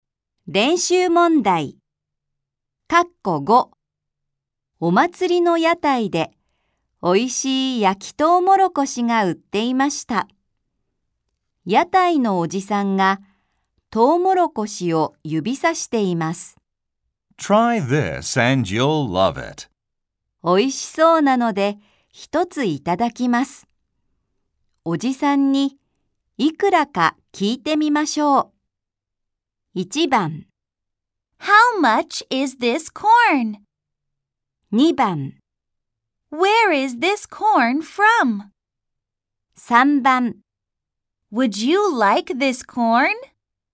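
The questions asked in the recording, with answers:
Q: おじさんに、いくらか聞いてみましょう。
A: 1: How much is this corn?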